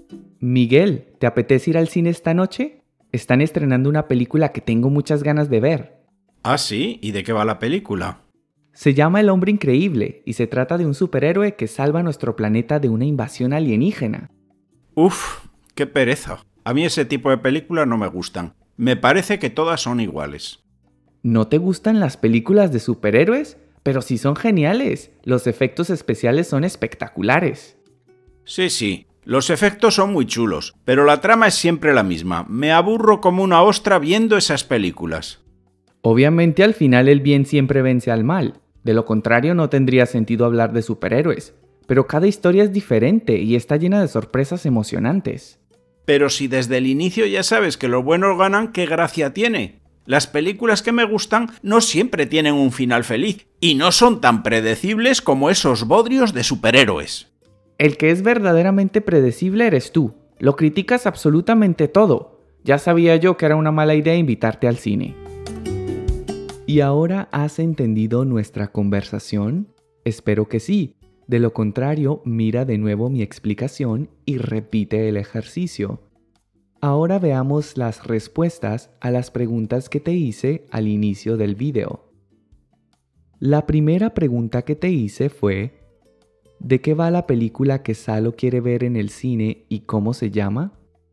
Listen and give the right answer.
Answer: la película se llama El hombre increíble y se trata de un superhéroe que salva nuestro planeta de una invasión alienígena.